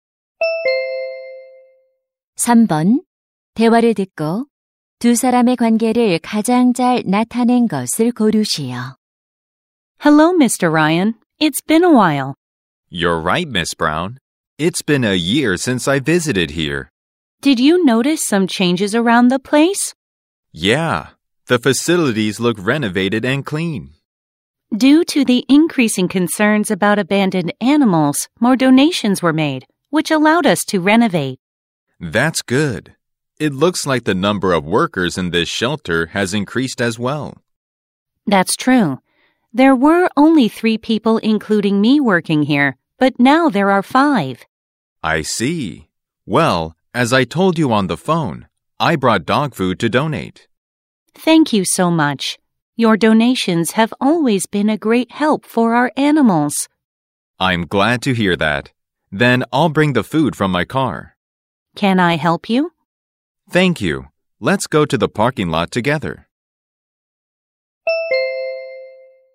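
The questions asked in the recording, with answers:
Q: 대화를 듣고 두 사람의 관계를 가장 잘 나타낸 것을 고르시오.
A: 동물 보호소 직원 - 기부자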